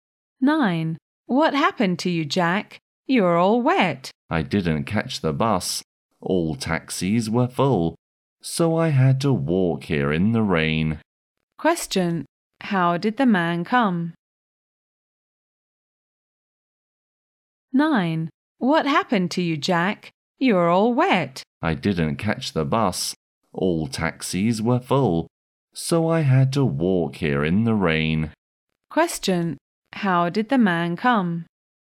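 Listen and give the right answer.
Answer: On foot, in the rain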